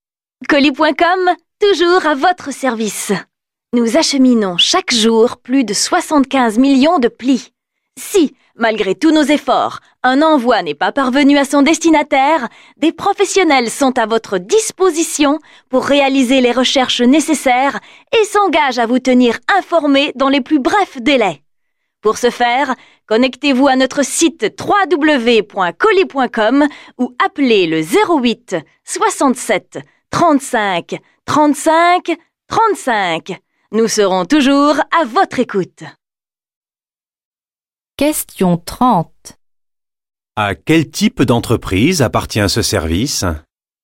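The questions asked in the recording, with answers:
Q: À quel type d'entreprise appartient ce service?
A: Une entreprise d'acheminement de colis et de courrier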